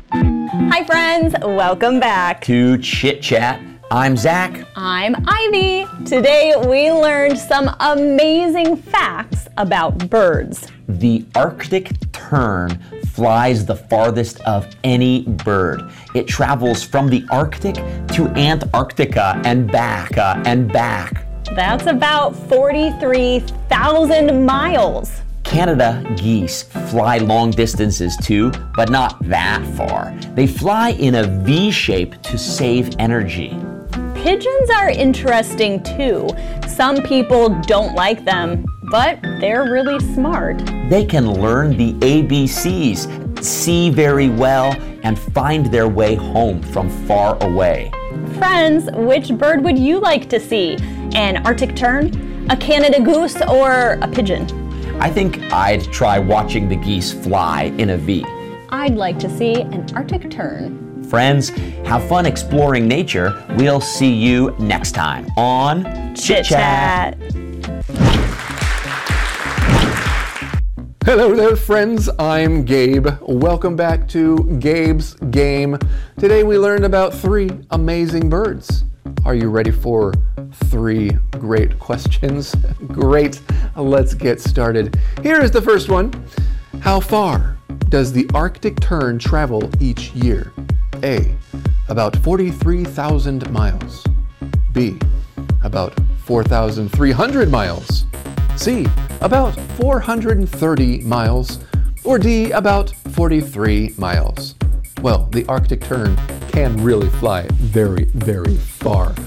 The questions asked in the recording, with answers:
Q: How far does the Arctic Tern travel each year?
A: If you said A, about 43,000 miles, you're right.